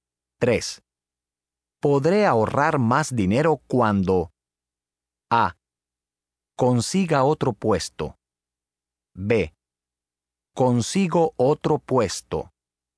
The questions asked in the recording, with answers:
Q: Podré ahorrar más dinero cuando A. Consiga otro puesto. B. Consigo otro puesto.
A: A. Podré ahorrar más dinero cuando consiga otro puesto.